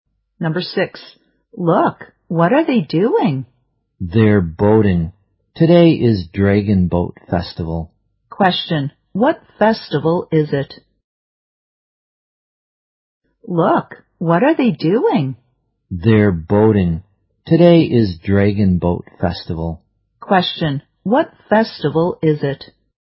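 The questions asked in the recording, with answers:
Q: what festival is it?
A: Dragon Boat Festival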